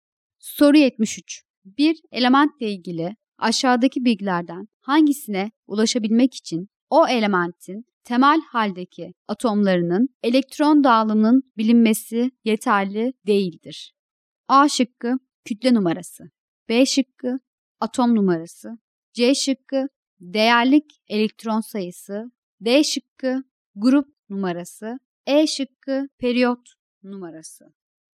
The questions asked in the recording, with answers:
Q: Bir elementle ilgili aşağıdaki bilgilerden hangisine ulaşabilmek için o elementin temel haldeki atomlarının elektron dağılımının bilinmesi yeterli değildir?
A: Doğru cevap A şıkkı.